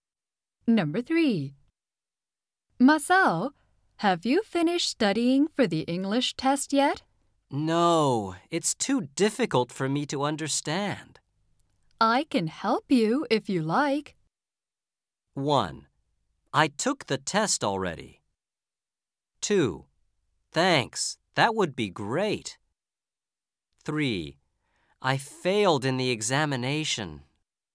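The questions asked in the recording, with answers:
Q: I can help you if you like.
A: 2: thanks, that would be great.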